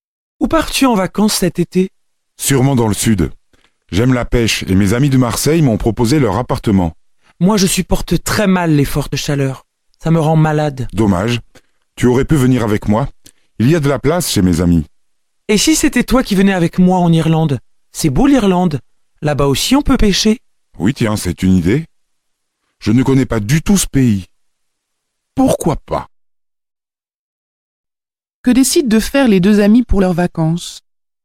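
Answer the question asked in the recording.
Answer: Partir ensemble en Irlande.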